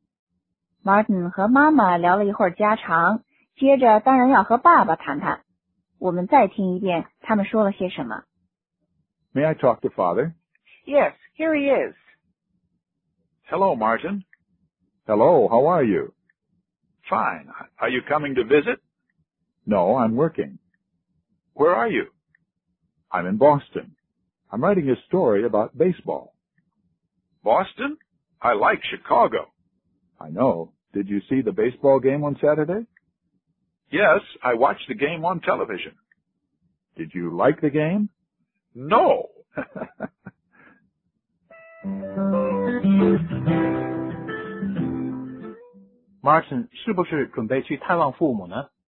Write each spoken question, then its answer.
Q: Martin 是不是准备去探望父母呢?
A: 不是,他正忙于工作。